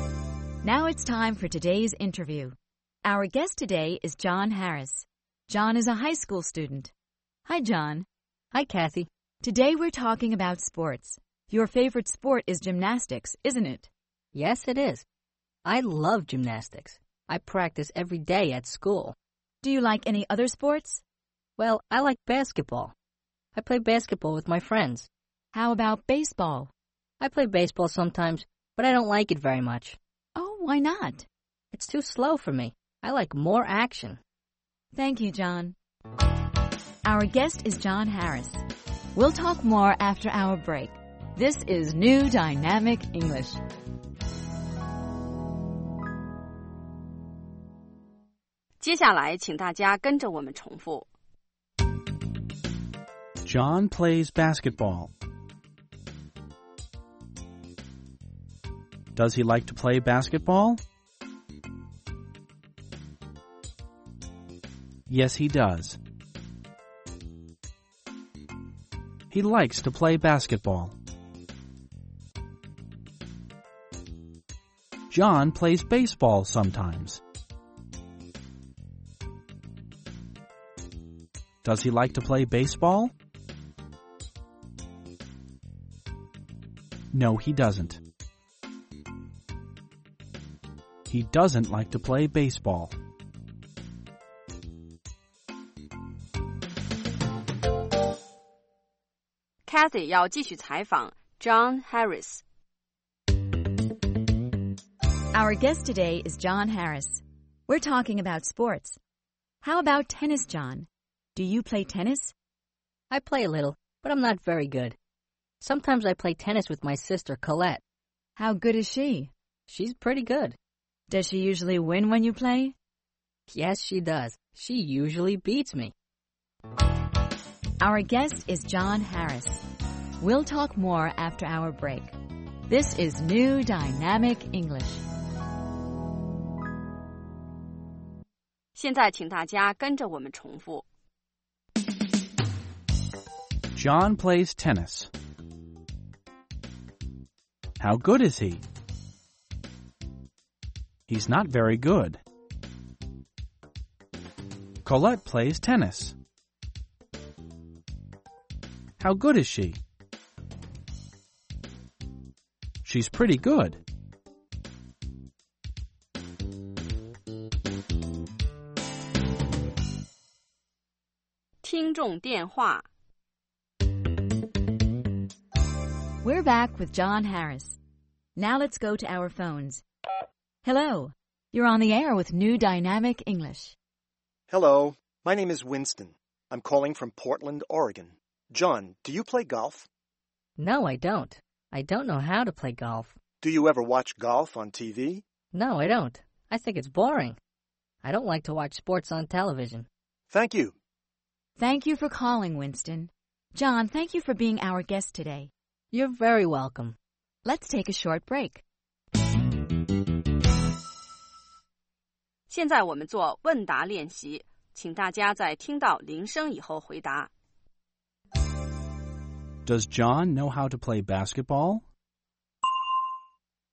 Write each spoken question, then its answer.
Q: Does John know how to play basketball?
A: Yes, he does. He knows how to play basketball.